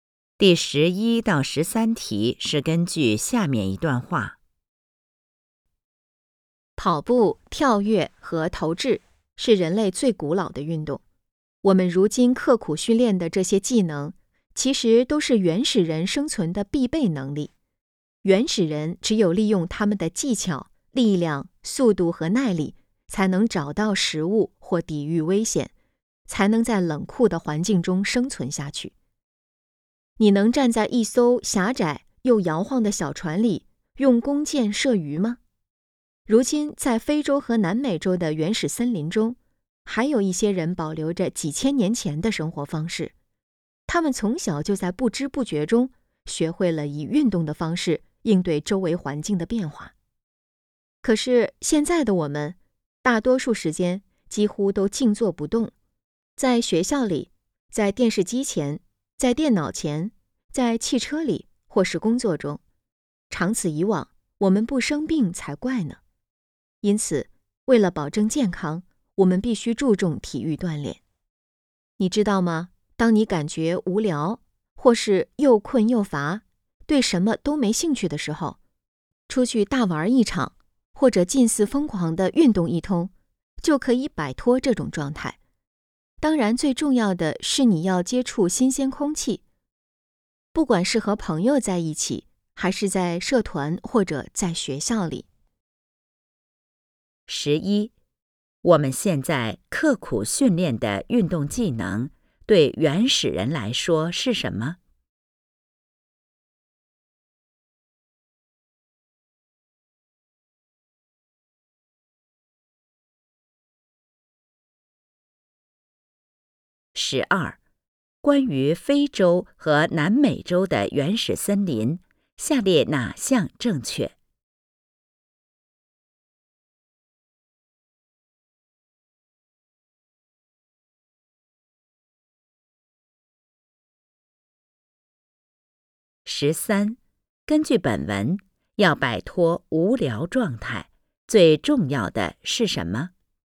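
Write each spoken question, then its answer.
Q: 我们现在刻苦训练的运动技能,对原始人来说是什么?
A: 生存的必备能力

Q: 根据本文,要摆脱无聊状态,最重要的是什么?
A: 接触新鲜空气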